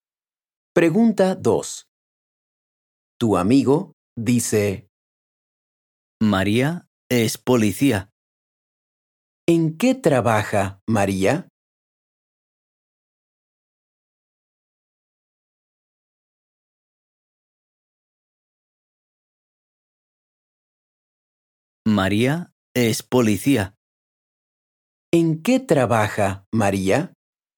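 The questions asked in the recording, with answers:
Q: ¿En qué trabaja María?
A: es policía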